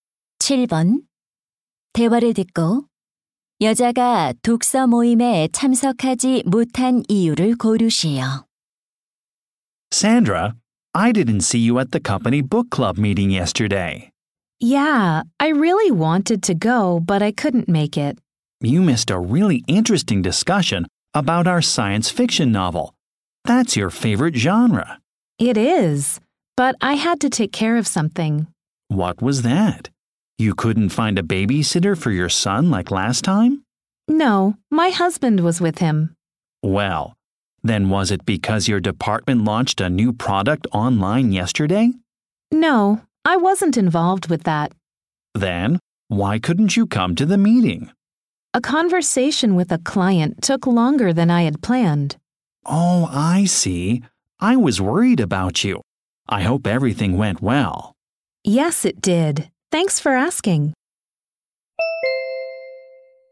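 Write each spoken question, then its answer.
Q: 대화를 듣고 여자가 독서 모임에 참석하지 못한 이유를 고르시오.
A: 고객과의 대화가 예정보다 길어져서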